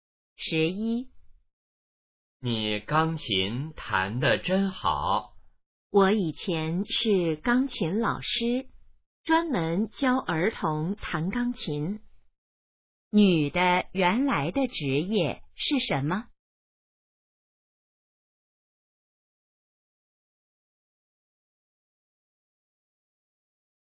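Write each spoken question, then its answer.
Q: 女的原来的职业是什么?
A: 钢琴老师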